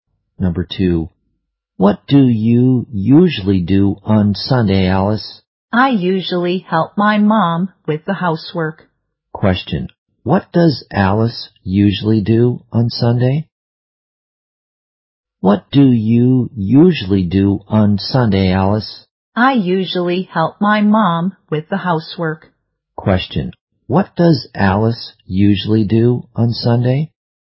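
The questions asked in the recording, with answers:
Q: what does Alice usually do on Sunday?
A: She helps her mom with the housework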